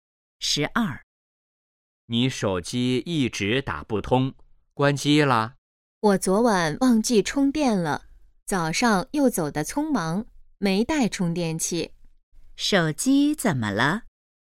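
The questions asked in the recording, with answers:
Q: 手机怎么了?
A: 没电了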